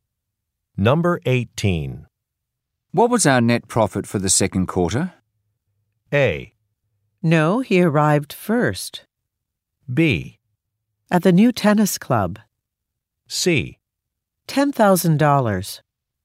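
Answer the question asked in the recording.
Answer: C: $10,000.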